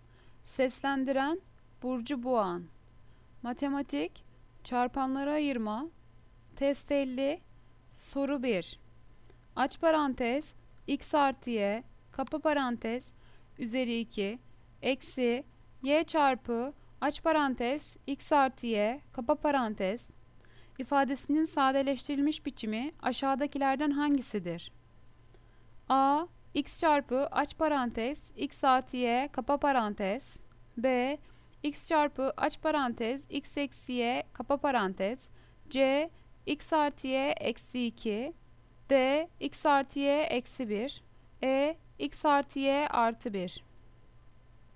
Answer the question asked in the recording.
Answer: Cevap Adana. X çarpı aç parantez x artı y kapa parantez.